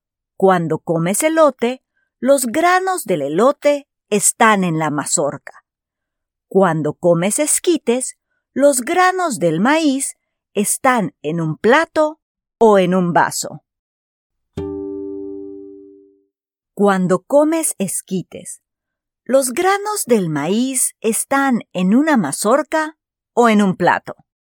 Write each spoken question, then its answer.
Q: Cuando comes esquites, ¿los granos del maíz están en una mazorca o en un plato?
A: Correcto. Cuando comes esquites, los granos del maíz están en un plato.